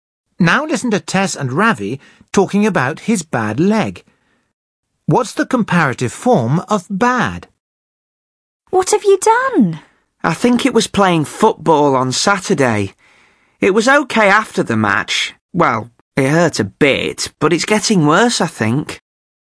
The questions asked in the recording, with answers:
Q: What's the comparative form of bad?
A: Ravi says his leg is getting worse.